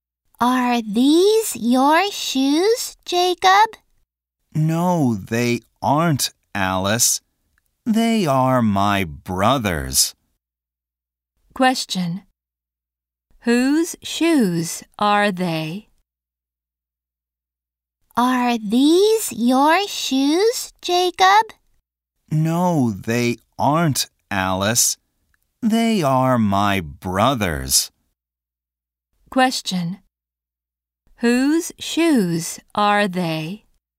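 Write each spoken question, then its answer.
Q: Question. Whose shoes are they?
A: They are Jacob's brother's.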